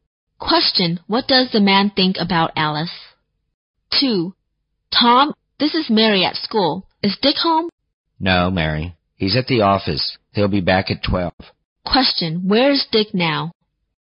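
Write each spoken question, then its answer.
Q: where is Dick now?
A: At the office.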